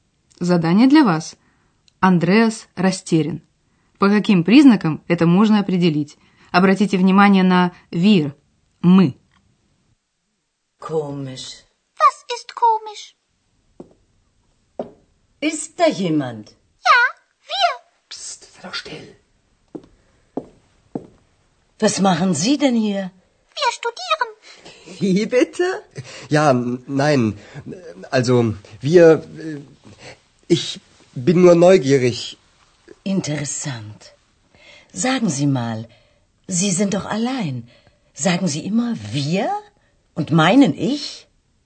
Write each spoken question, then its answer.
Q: Андреас растерян. По каким признакам это можно определить?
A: Вы, вероятно, распознали растерянность Андреаса по голосу, по его заикающемуся ответу.